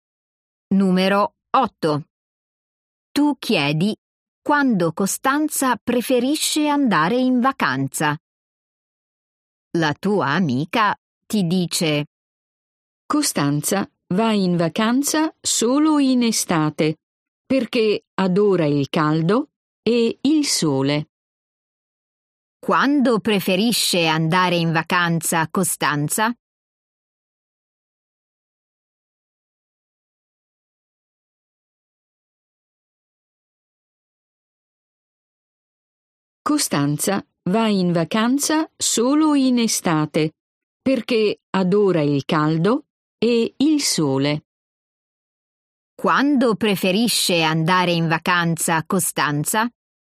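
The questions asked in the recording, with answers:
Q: Quando preferisce andare in vacanza, Costanza?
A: In estate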